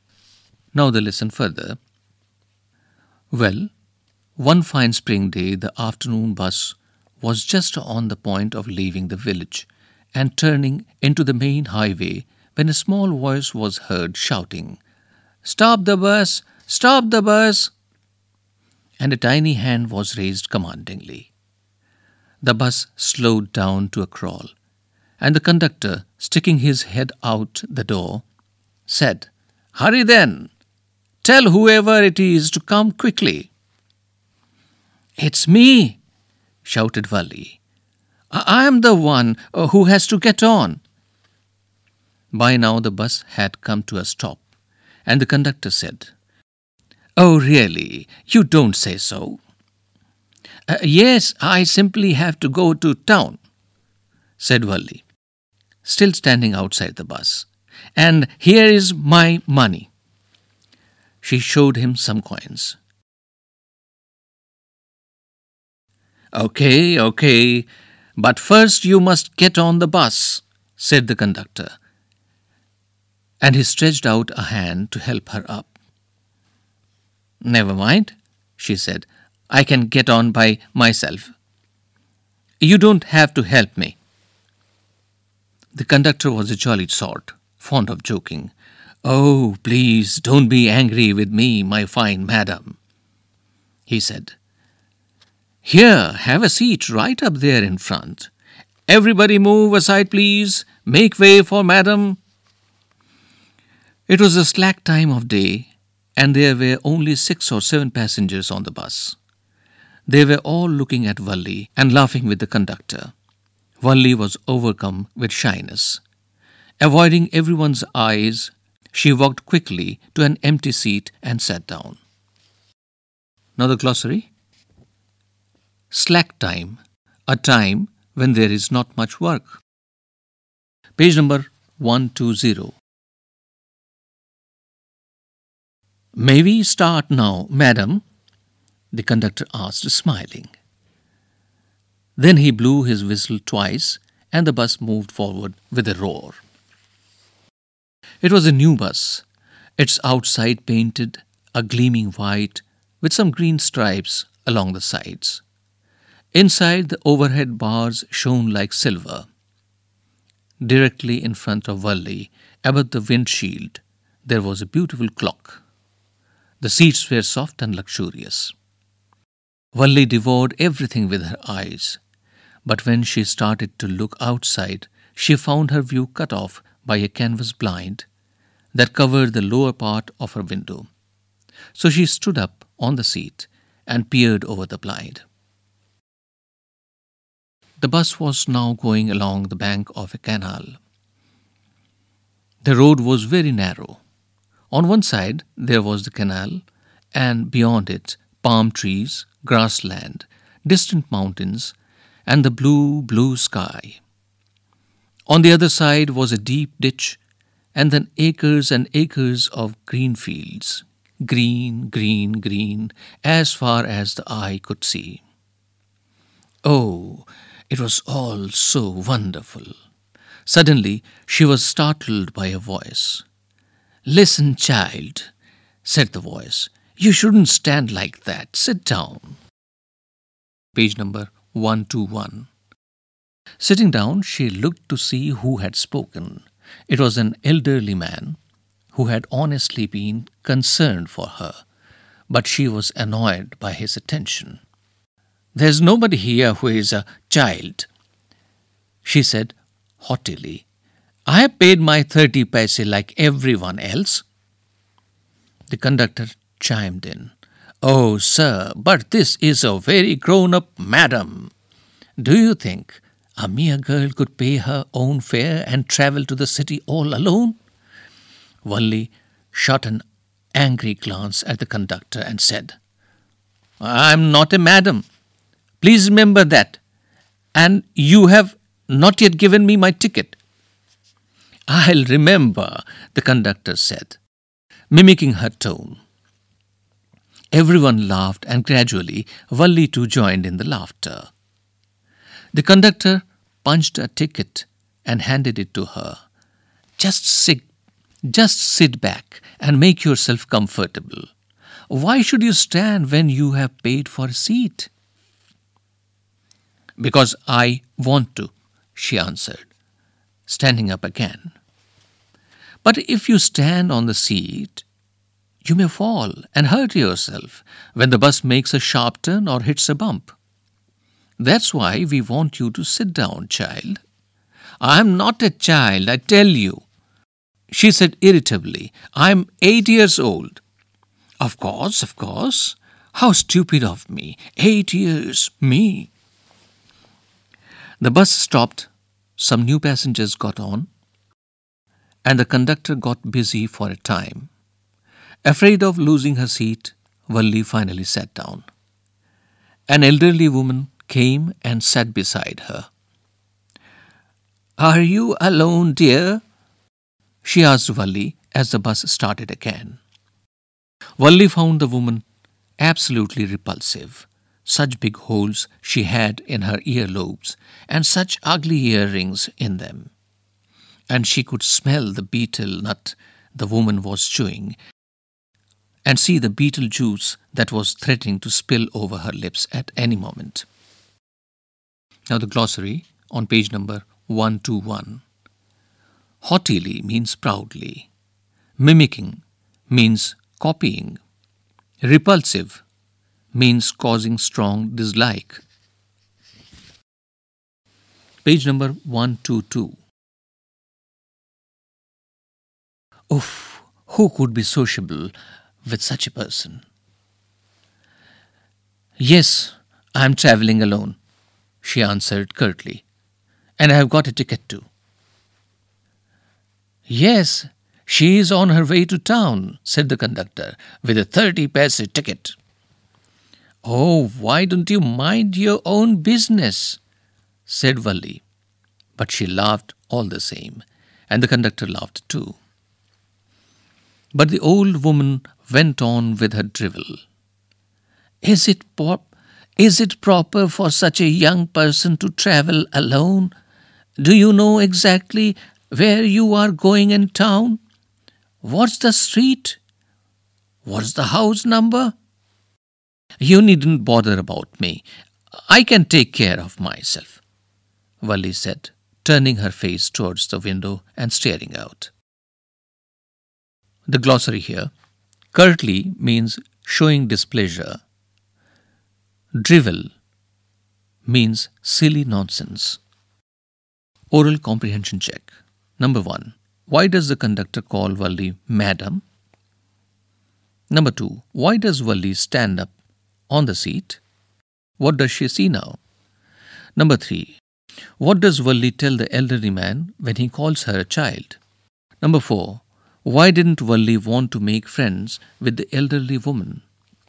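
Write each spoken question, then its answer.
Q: Why does the conductor call Valli madam?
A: He was joking because she acted like a grown-up, insisting on paying and getting on the bus by herself

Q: Why does Valli stand up on the seat?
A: A canvas blind blocked her view out of the window

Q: What does she see now?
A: The canal, palm trees, grassland, distant mountains, blue sky, and green fields

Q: What does Valli tell the elderly man when he calls her a child?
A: That nobody here is a child; she has paid her 30 paise like everyone else

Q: Why didn't Valli want to make friends with the elderly woman?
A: She found her repulsive: big holes in her earlobes, ugly earrings, and betel juice about to spill over her lips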